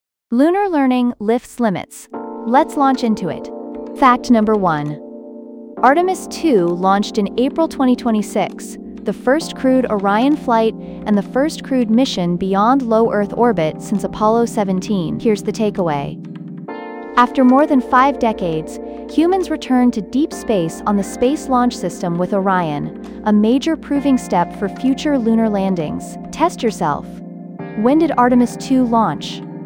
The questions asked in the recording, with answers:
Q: When did Artemis II launch?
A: Correct answer, April 2026.